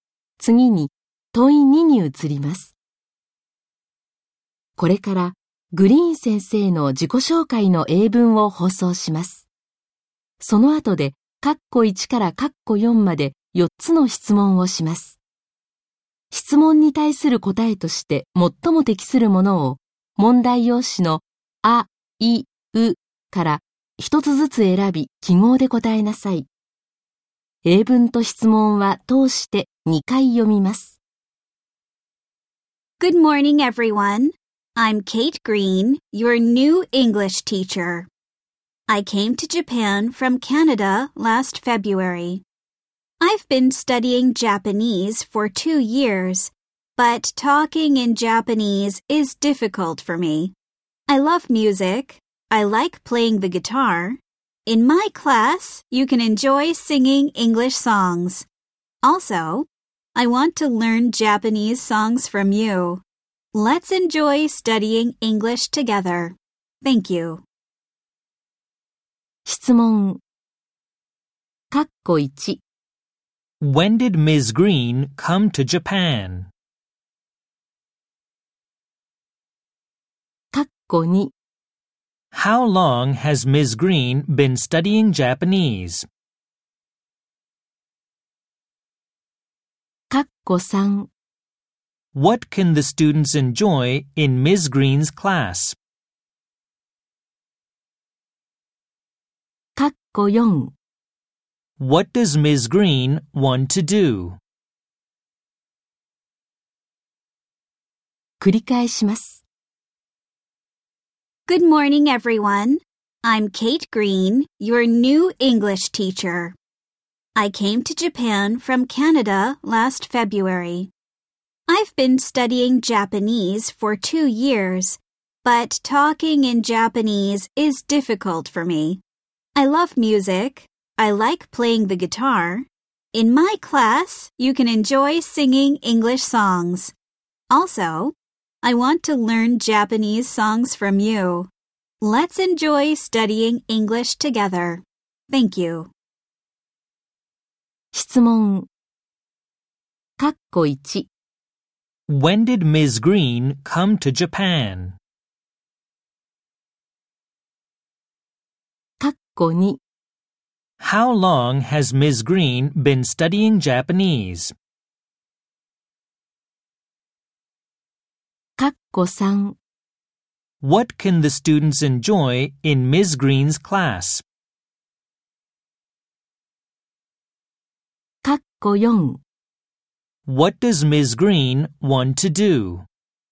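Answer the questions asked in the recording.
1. Last February
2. For 2 years
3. Singing English songs
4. Learn Japanese songs from the students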